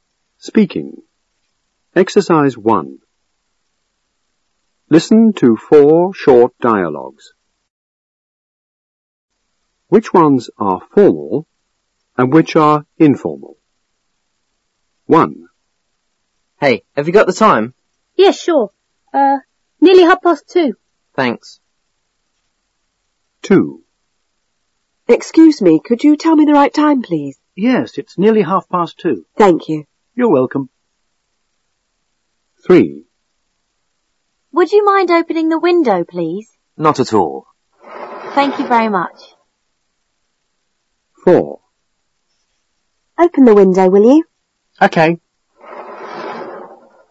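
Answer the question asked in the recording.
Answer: Dialogues 2 and 3 are formal; dialogues 1 and 4 are informal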